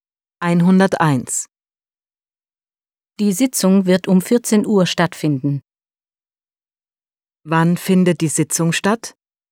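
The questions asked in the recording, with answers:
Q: Wann findet die Sitzung statt?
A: Um 14 Uhr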